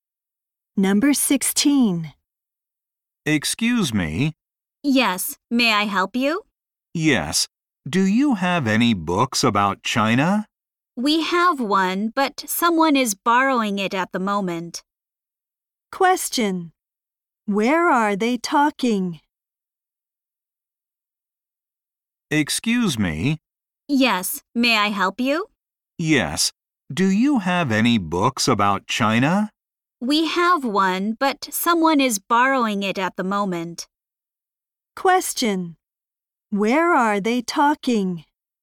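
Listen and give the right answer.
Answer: At a library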